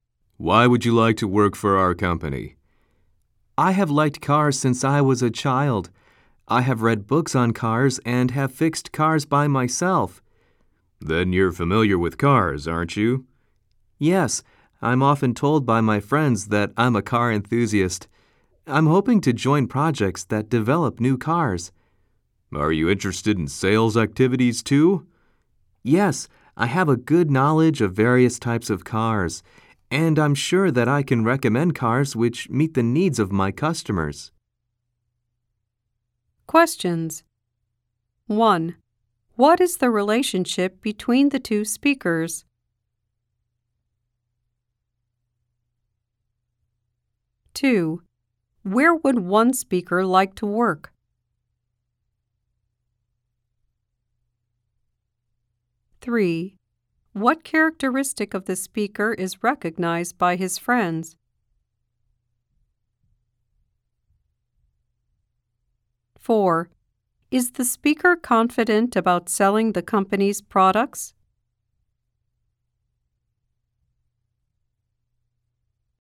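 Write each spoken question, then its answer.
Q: What is the relationship between the two speakers?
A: Interviewer and job applicant

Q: Where would one speaker like to work?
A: At a car company

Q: What characteristic of the speaker is recognized by his friends?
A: He is a car enthusiast

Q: Is the speaker confident about selling the company's products?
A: Yes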